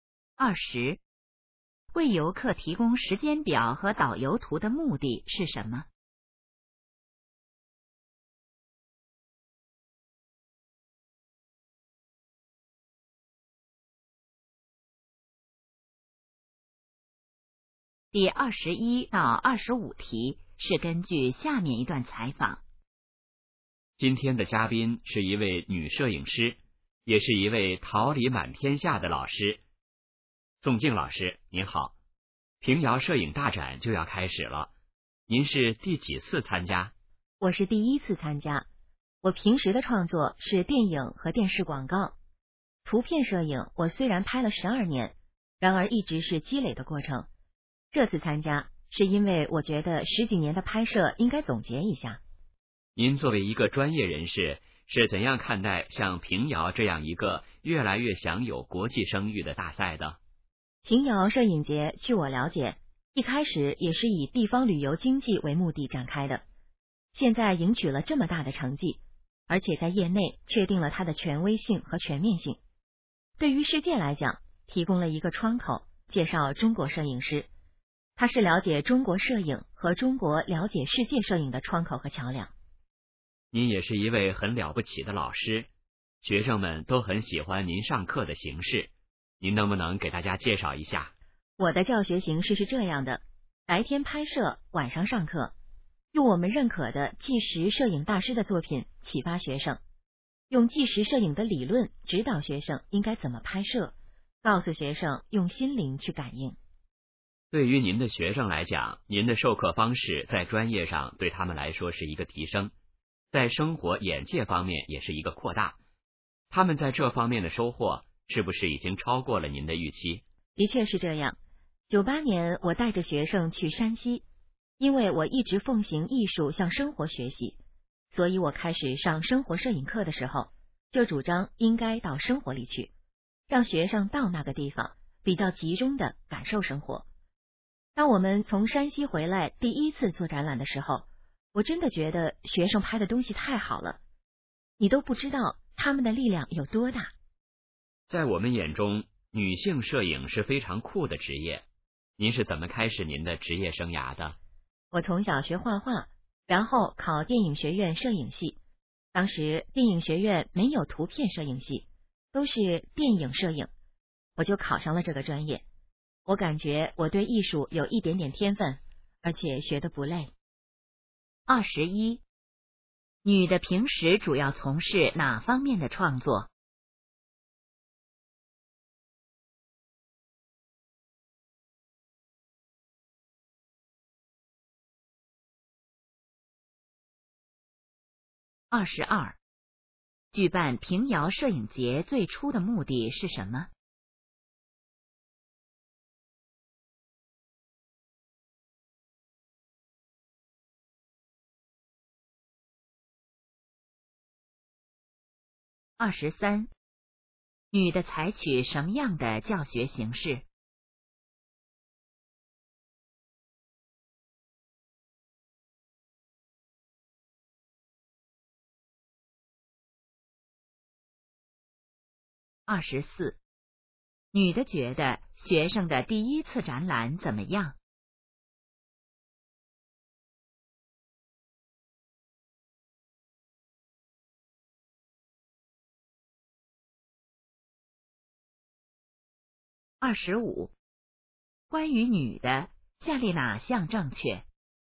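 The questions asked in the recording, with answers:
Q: 女的平时主要从事哪方面的创作?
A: 电影和电视广告

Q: 举办平遥摄影节最初的目的是什么?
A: 发展地方旅游经济

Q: 女的采取什么样的教学形式?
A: 白天拍摄,晚上上课

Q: 女的觉得学生的第一次展览怎么样?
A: 拍得非常好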